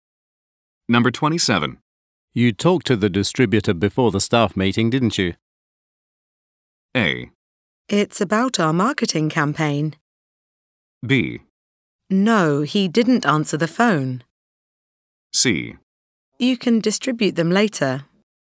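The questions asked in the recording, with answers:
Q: You talked to the distributor before the staff meeting, didn't you?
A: B: No, he didn't answer the phone.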